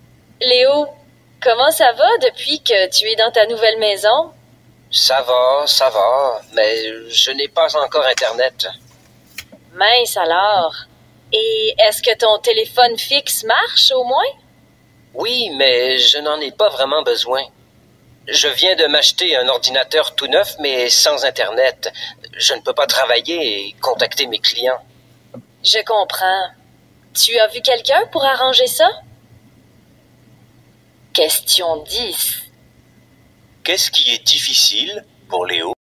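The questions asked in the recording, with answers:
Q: Qu'est-ce qui est difficile pour Léo?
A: Il n'a pas encore Internet, donc il ne peut pas travailler ni contacter ses clients.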